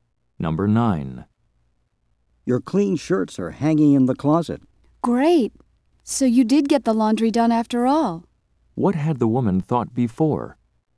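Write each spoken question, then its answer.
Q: What had the woman thought before?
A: That the laundry had not been done.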